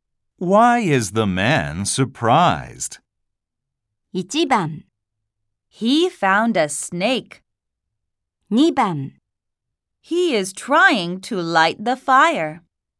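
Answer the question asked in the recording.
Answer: 1: He found a snake.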